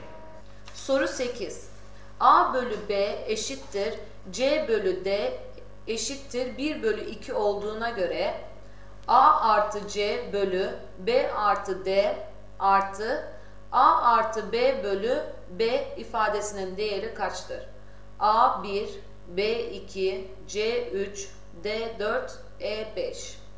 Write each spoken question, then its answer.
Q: A bölü B eşittir C bölü D eşittir 1 bölü 2 olduğuna göre A artı C bölü B artı D artı A artı B bölü B ifadesinin değeri kaçtır?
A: Doğru cevap B 2.